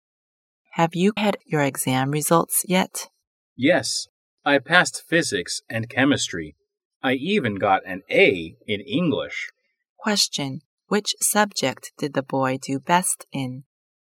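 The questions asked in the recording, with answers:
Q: Question, which subject did the boy do best in?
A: English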